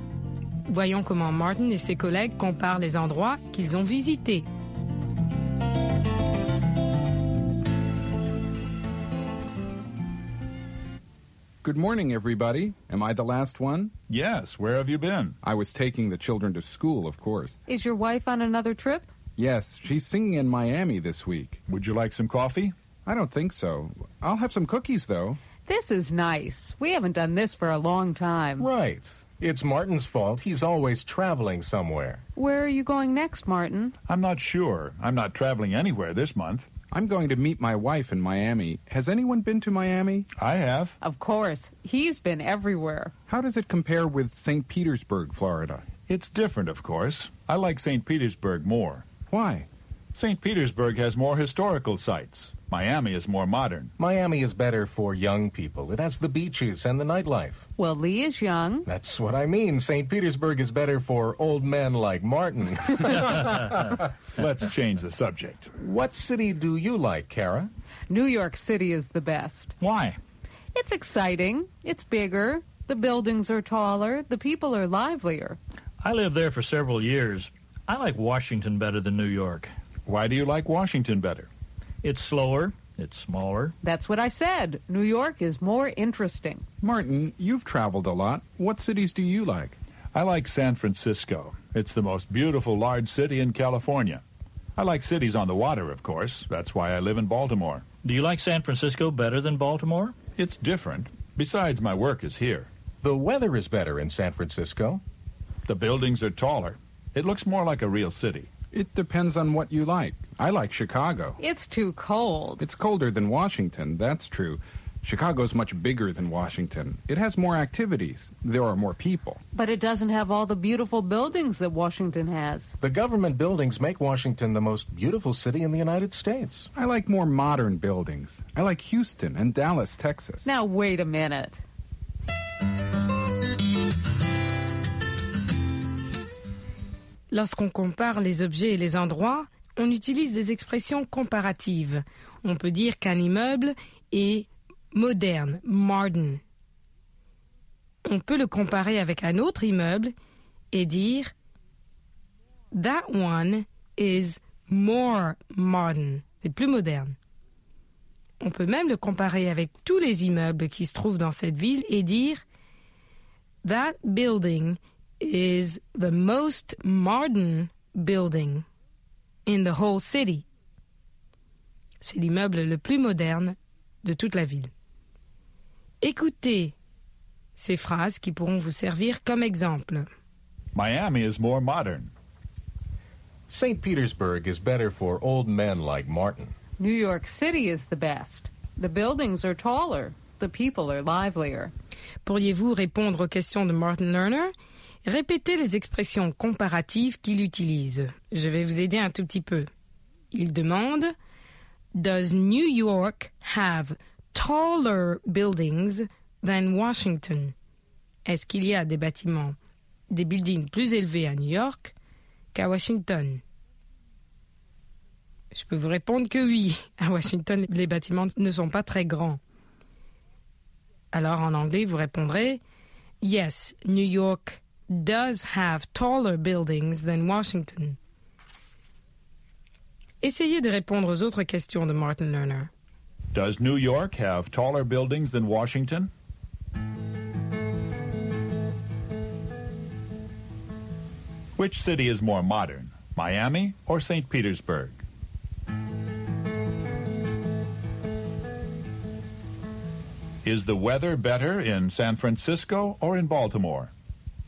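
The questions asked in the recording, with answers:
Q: Which city is more modern, Miami or St.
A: Miami

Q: Is the weather better in San Francisco or in Baltimore?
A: In San Francisco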